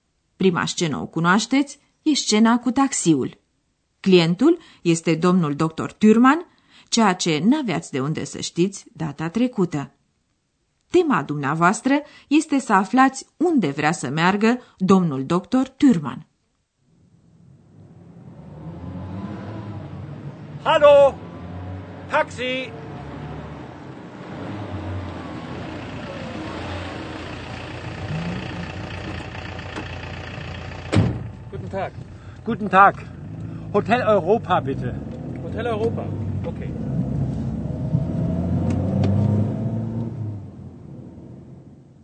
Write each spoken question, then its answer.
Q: Tema dumneavoastră este să aflați unde vrea să meargă domnul dr.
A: Dr. Thürmann vrea așadar ca șoferul să-l ducă la Hotel Europa, Hotel Europa.